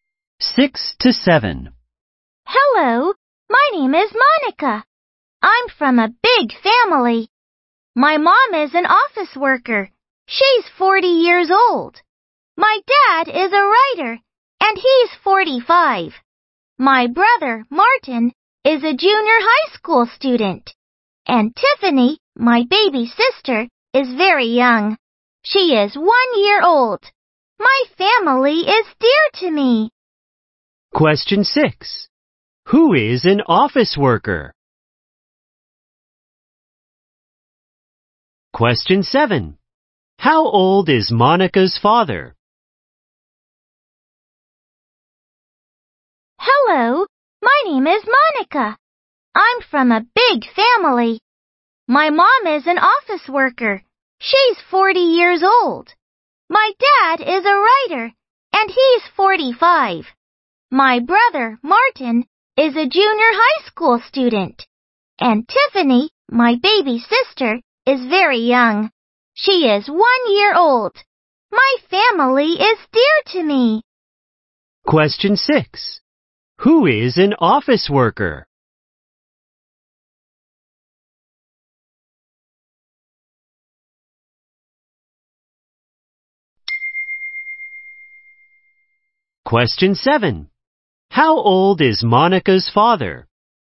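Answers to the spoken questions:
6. Monica's mom
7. 45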